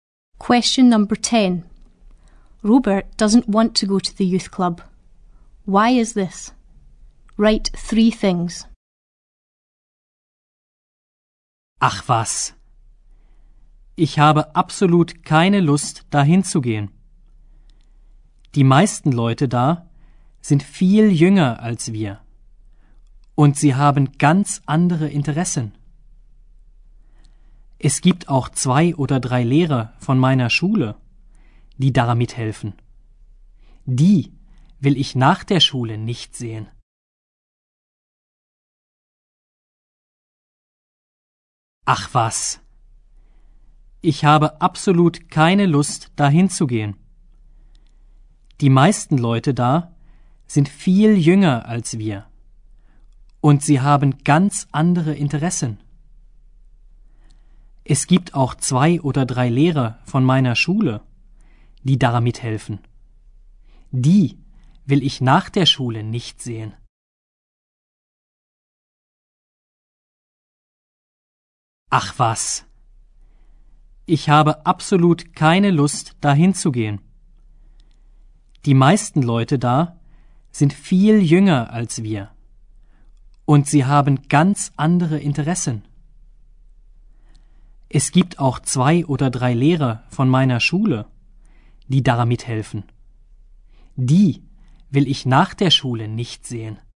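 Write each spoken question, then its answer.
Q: Why is this? Write three things.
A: Most people there are much younger; they have completely different interests; two or three teachers from his school help there and he doesn't want to see them after school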